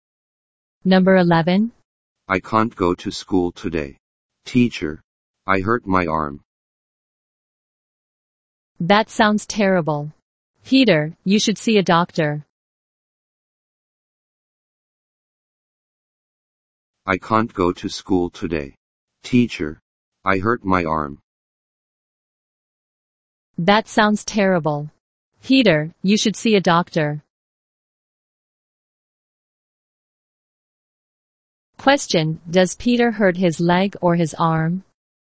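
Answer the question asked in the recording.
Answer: His arm.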